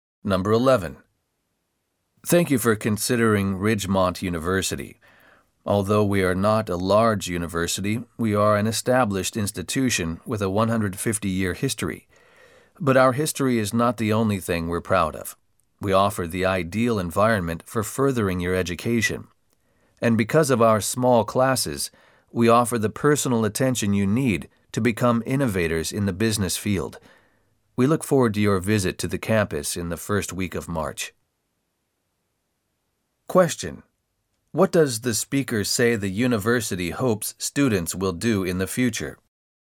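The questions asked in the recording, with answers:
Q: What does the speaker say the university hopes students will do in the future?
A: Become innovators in the business field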